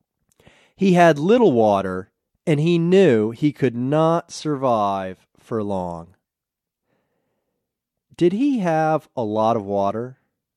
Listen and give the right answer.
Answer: No, he didn't have a lot of water.